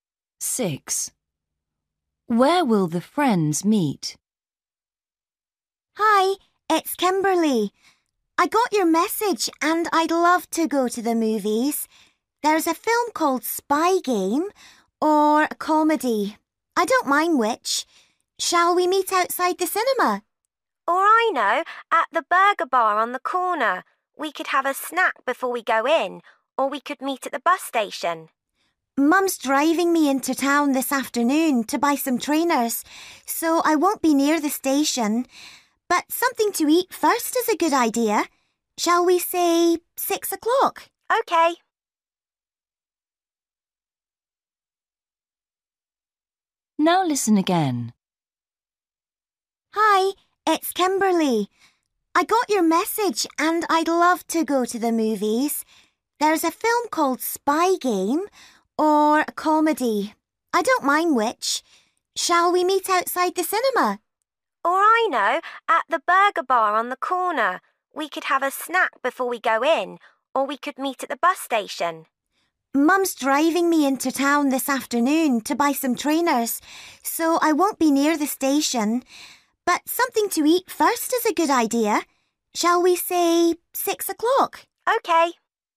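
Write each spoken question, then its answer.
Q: Where will the friends meet?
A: at the burger bar on the corner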